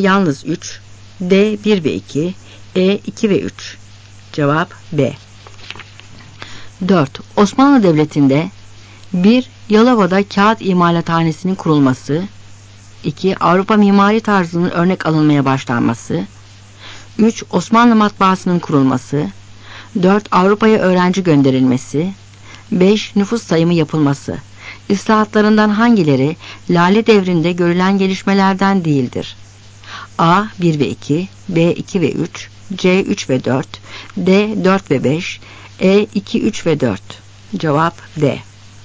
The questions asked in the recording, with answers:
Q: İslahatlarından hangileri Lale Devri'nde görülen gelişmelerden değildir?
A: Cevap D.